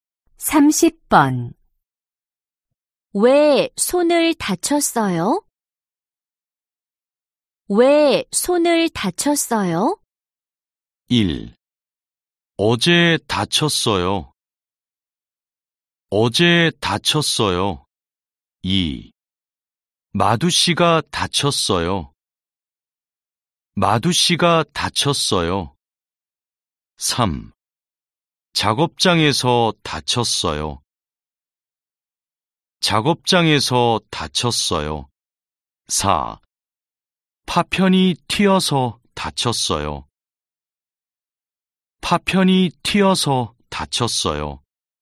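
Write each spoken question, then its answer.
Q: 왜 손을 다쳤어요?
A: 4: 파편이 튀어서 다쳤어요.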